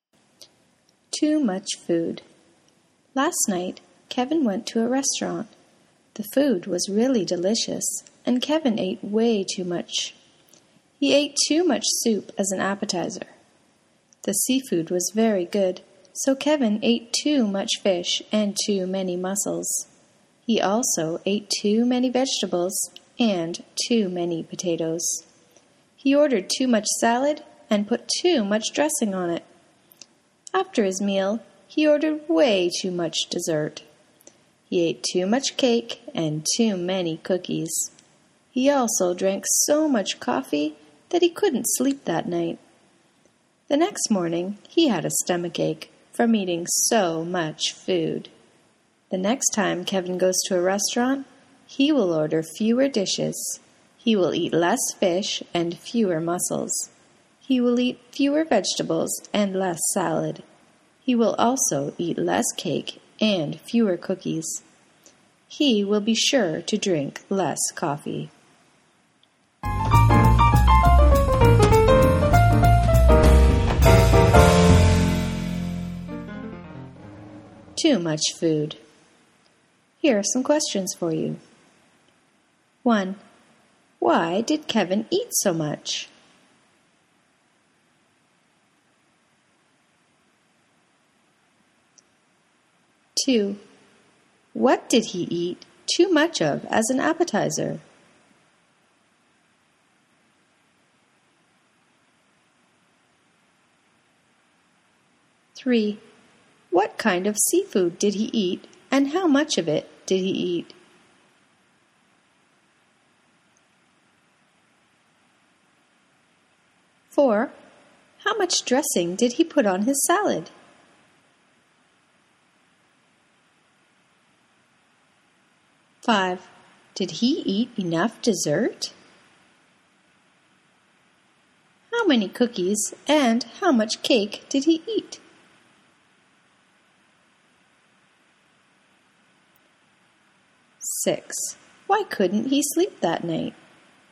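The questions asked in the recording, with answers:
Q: Why did Kevin eat so much?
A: The food was really delicious

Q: What did he eat too much of as an appetizer?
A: Soup

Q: What kind of seafood did he eat, and how much of it did he eat?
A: Too much fish and too many mussels

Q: How much dressing did he put on his salad?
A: Too much

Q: Did he eat enough dessert?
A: No, he ate way too much dessert

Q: How many cookies and how much cake did he eat?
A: Too many cookies and too much cake

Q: Why couldn't he sleep that night?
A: He drank too much coffee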